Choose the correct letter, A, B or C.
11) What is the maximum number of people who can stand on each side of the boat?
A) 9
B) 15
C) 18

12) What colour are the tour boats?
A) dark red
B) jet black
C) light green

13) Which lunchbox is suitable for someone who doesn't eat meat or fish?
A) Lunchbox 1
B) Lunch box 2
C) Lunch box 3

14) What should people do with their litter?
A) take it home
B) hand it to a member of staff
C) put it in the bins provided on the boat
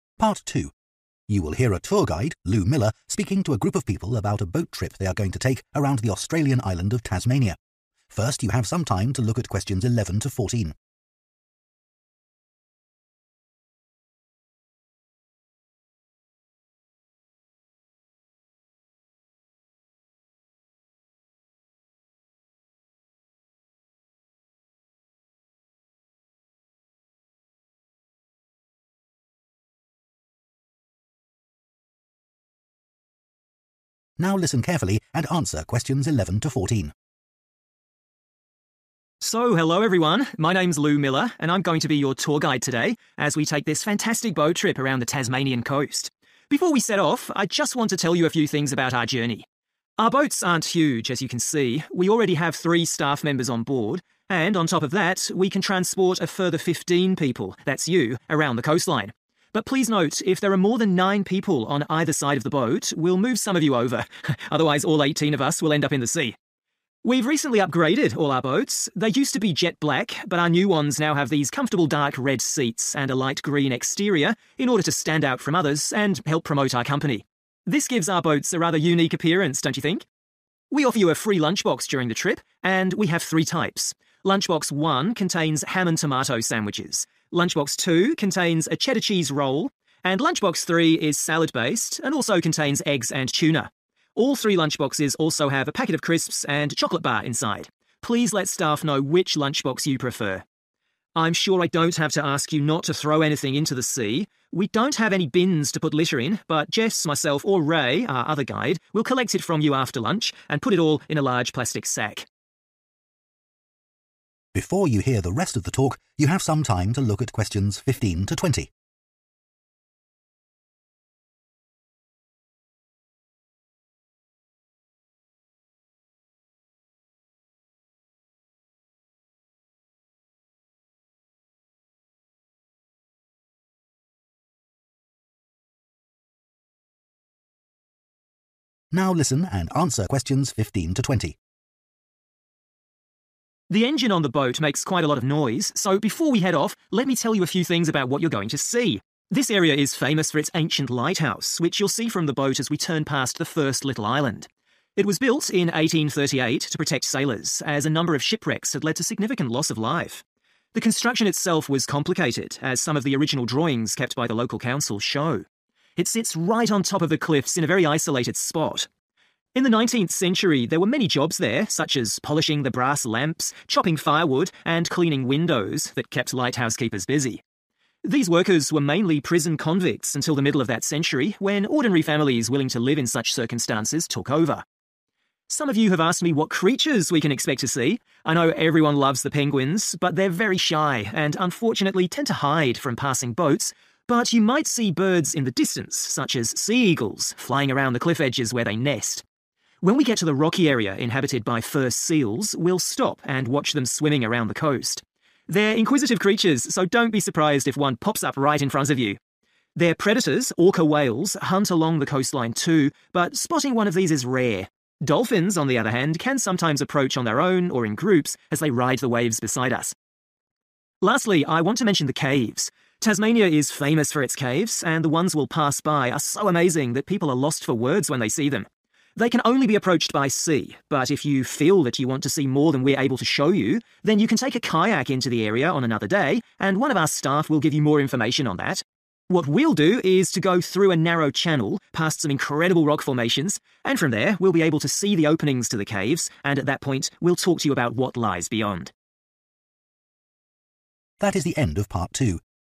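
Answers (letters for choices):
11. A
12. C
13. B
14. B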